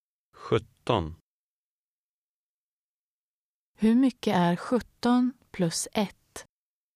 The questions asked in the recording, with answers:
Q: Hur mycket är 17 plus 1?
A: 18.